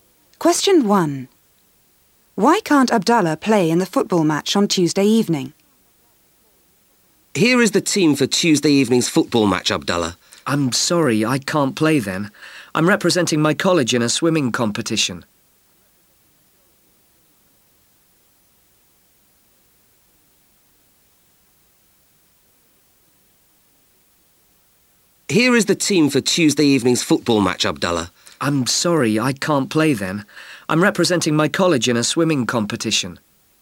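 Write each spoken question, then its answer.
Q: Why can't Abdallah play in the football match on Tuesday evening?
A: He's representing his college in a swimming competition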